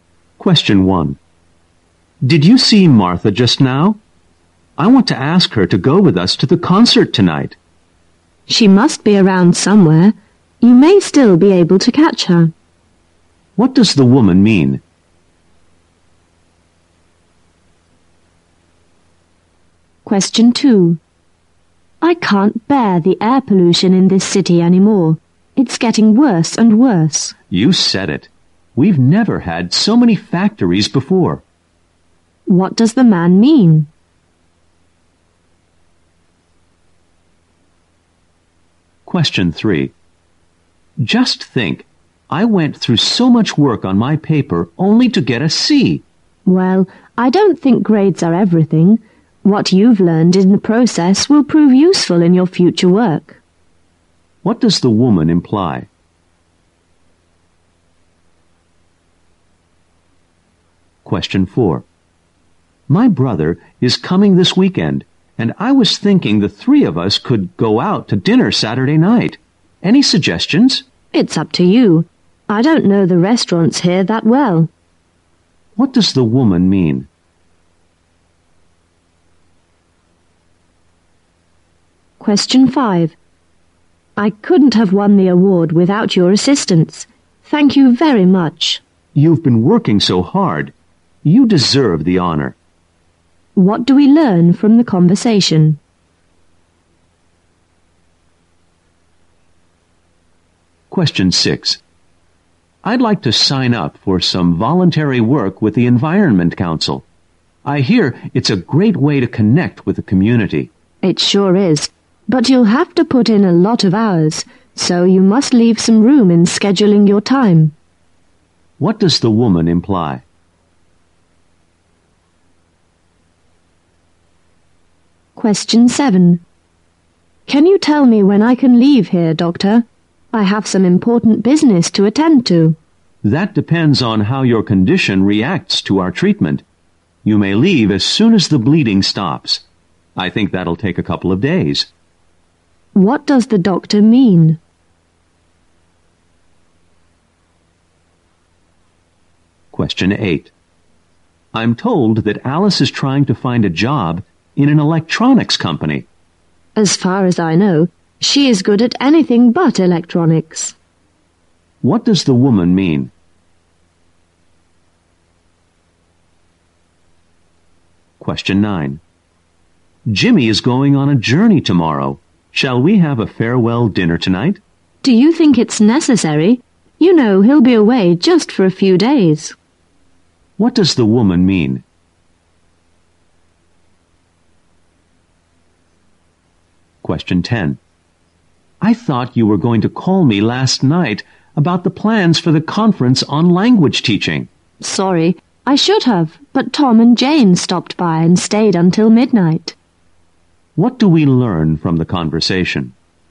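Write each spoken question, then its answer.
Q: What does the woman mean?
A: Martha is probably nearby and the man may still catch her.

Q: What does the man mean?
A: He agrees that pollution is getting worse because there are more factories.

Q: What does the woman imply?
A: What you learn matters more than the grade.

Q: What does the woman mean?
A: The man should choose the restaurant.

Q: What do we learn from the conversation?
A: The man won an award with the woman's help.

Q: What does the woman imply?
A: The voluntary work takes a lot of time.

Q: What does the doctor mean?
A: The man can probably leave in a couple of days, once the bleeding stops.

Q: What does the woman mean?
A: Alice is not suited to work in electronics.

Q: What does the woman mean?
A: A farewell dinner isn't necessary.

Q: What do we learn from the conversation?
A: The man didn't call because visitors stayed until midnight.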